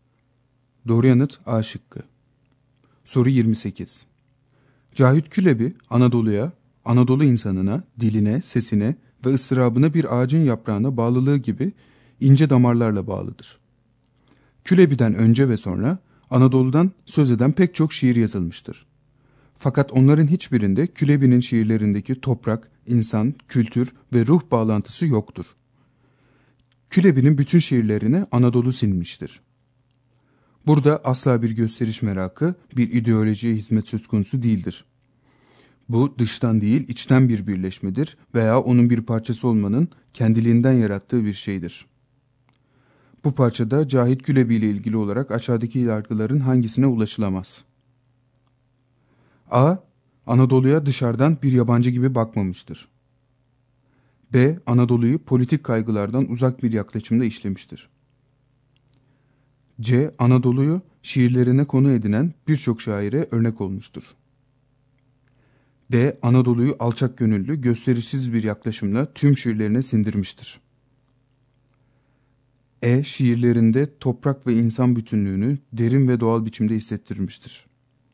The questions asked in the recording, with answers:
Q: Bu parçada Cahit Külebi ile ilgili olarak aşağıdaki yargıların hangisine ulaşılamaz?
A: Doğru yanıt C şıkkı.